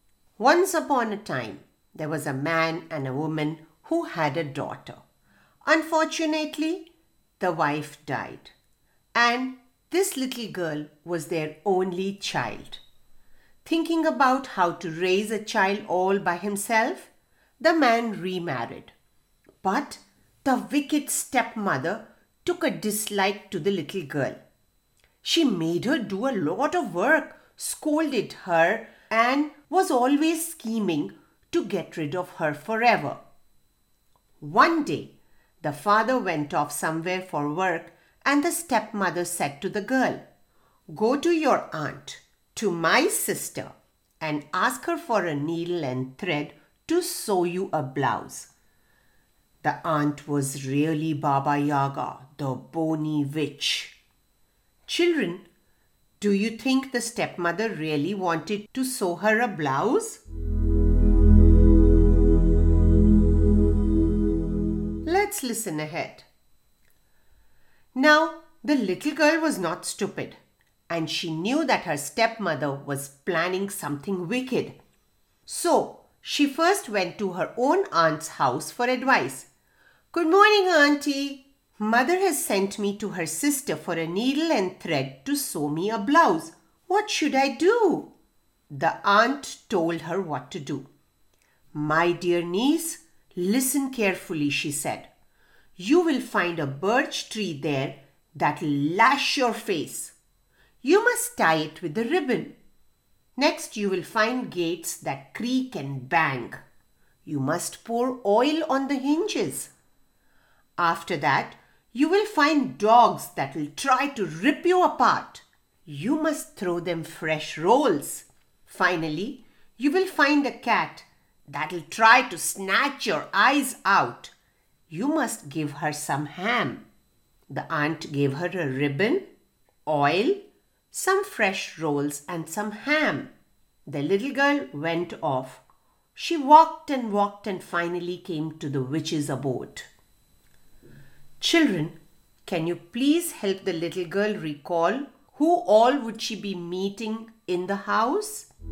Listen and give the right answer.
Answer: The birch tree, the gates, the dog, the cat, and of course Baba Yaga, the witch.